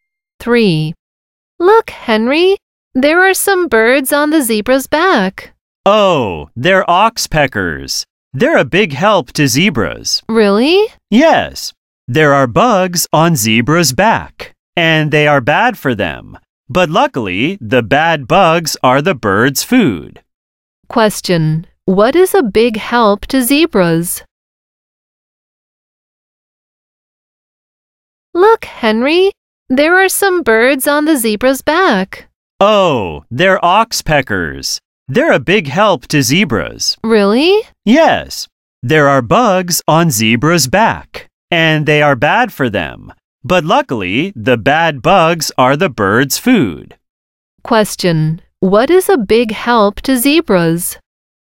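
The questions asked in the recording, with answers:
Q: What is a big help to zebras?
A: Oxpeckers (birds)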